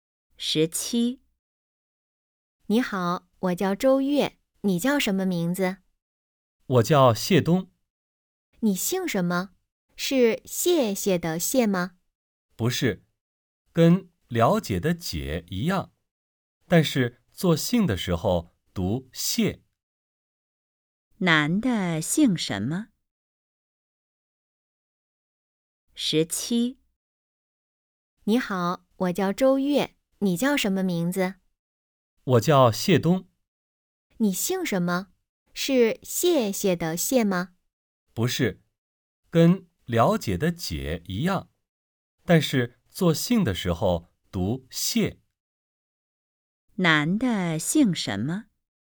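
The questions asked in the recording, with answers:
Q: 男的姓什么?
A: 谢(写作了解的解)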